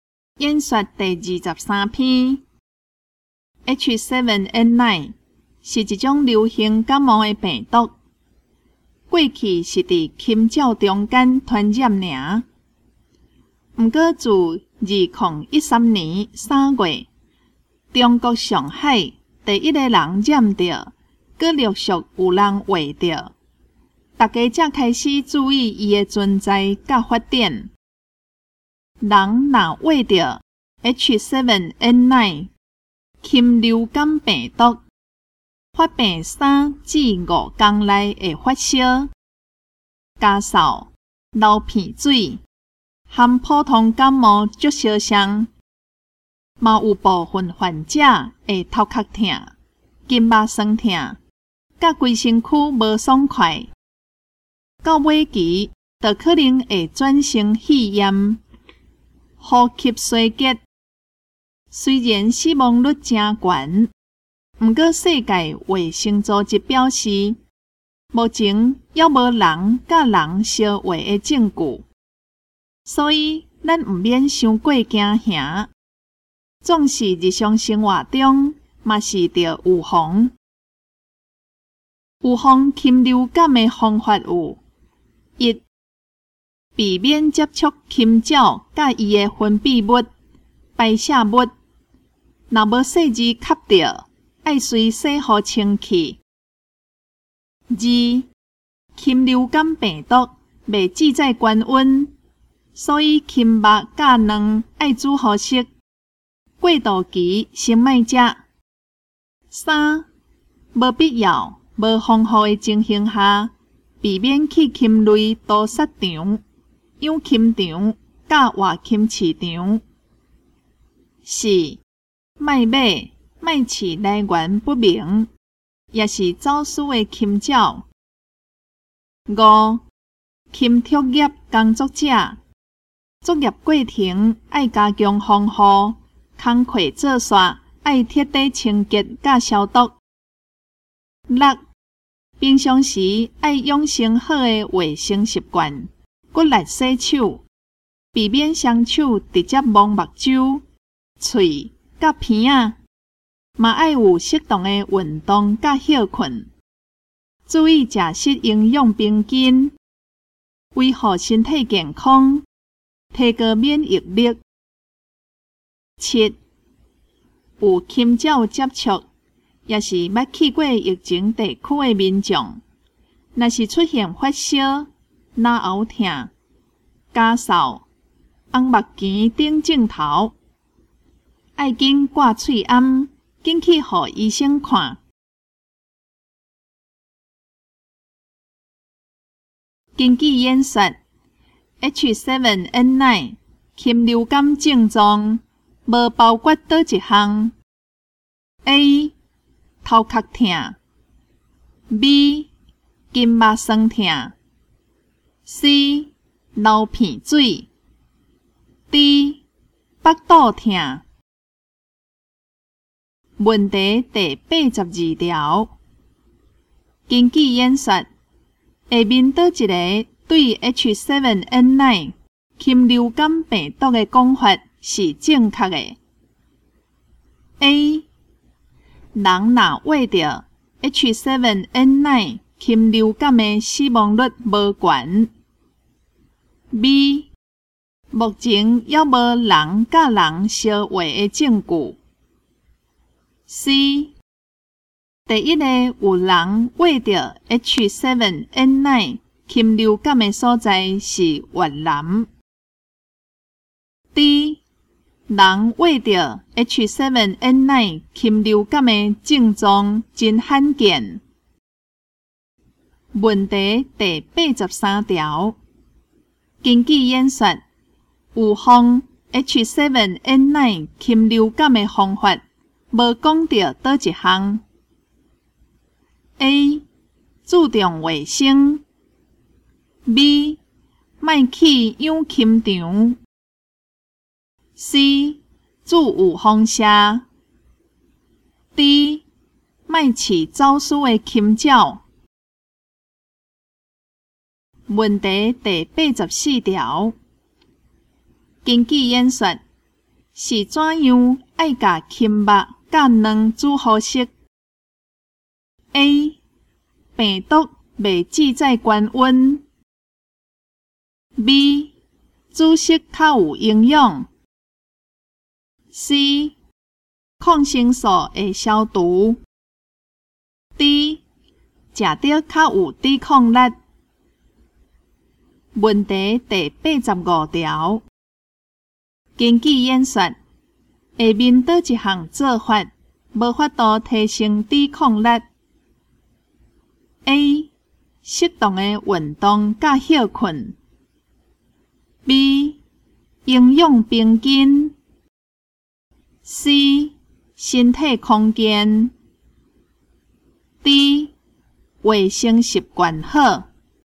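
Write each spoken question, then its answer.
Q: 根据演说 H7N9 禽流感症状无包括倒一项 A 头壳痛 B 筋膜酸痛 C流鼻水 D 腹肚痛。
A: D: 腹肚痛

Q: 根据演说,下面倒一个对 H7N9 禽流感病毒的讲法是正确的。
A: B: 目前还无人甲人相会的证据。

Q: 根据演说,预防 H7N9 禽流感的方法无讲到倒一项。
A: C: 注有风沙。

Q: 根据演说, 是怎样爱甲青肉甲卵煮好食 ?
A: A: 病毒未止在高温。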